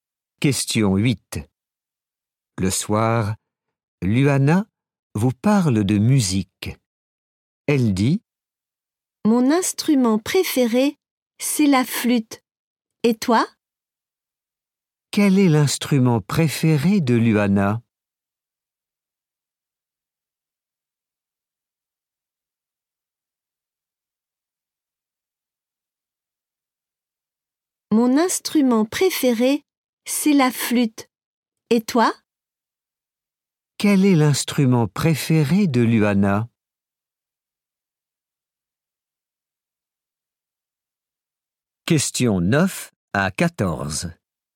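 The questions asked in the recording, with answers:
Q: Quel est l'instrument préféré de Luana ?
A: La flûte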